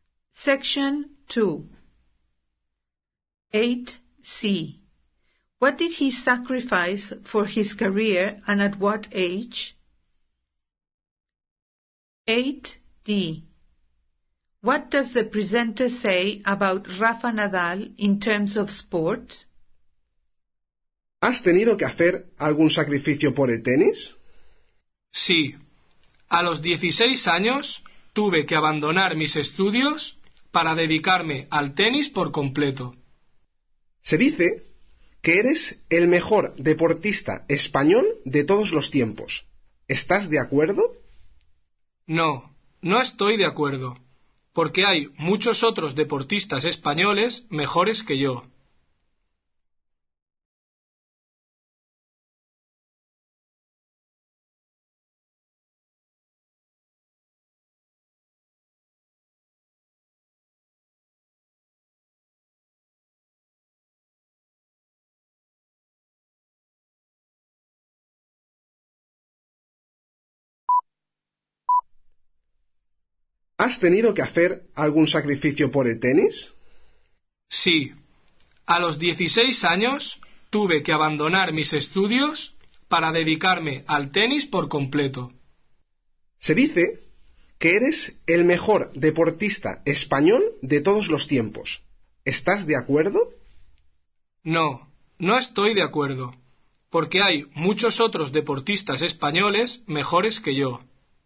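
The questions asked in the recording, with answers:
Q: What did he sacrifice for his career and at what age?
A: He gave up his studies at 16

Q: What does the presenter say about Rafa Nadal in terms of sport?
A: That people say he is the best Spanish sportsman of all time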